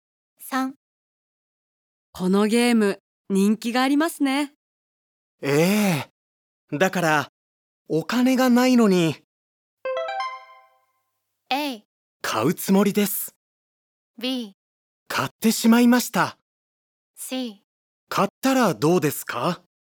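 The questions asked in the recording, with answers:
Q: ええ。だからお金がないのに。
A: B: 買ってしまいました。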